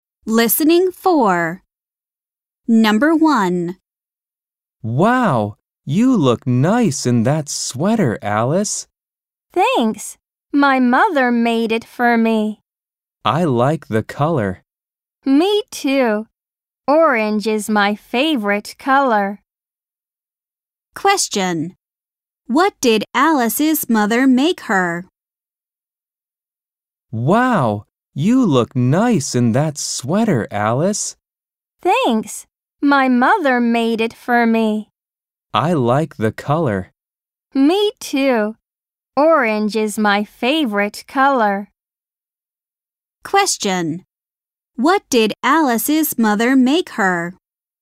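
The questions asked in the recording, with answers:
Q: What did Alice's mother make her?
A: A sweater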